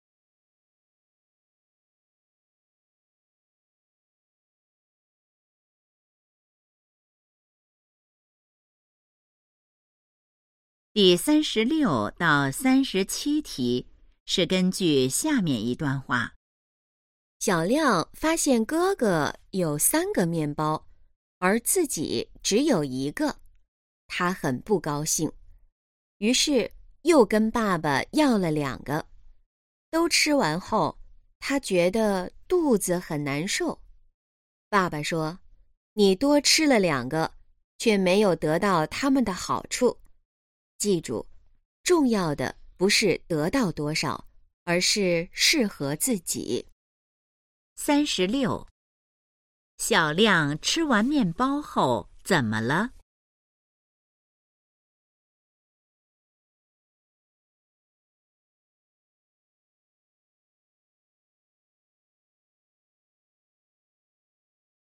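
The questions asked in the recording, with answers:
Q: 小亮吃完面包后怎么了?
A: 肚子很难受

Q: 根据这段话,什么才是最重要的?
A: 适合自己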